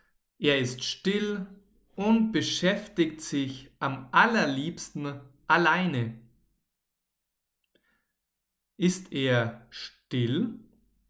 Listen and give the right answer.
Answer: Ja, genau, er ist still.